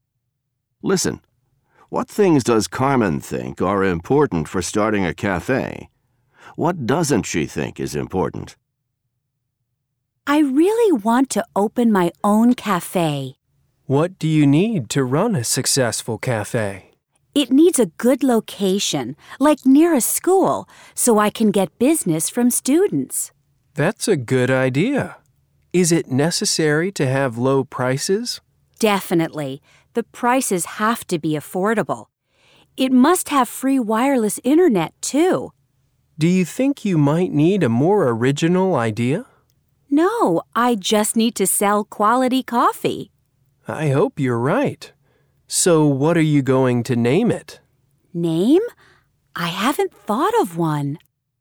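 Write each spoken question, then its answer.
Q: What things does Carmen think are important for starting a cafe?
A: A good location near a school, affordable prices, free wireless internet, and quality coffee

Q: What doesn't she think is important?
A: A more original idea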